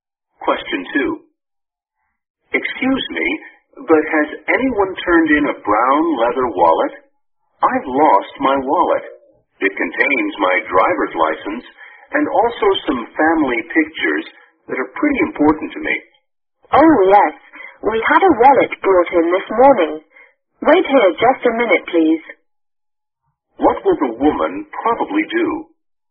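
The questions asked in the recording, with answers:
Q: What will the woman probably do?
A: Go and get the wallet that was brought in so the man can check it.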